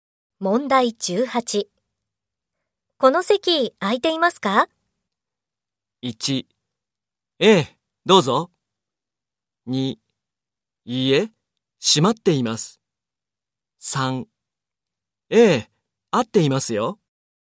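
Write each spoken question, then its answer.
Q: この席空いていますか?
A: 3: ええ、どうぞ。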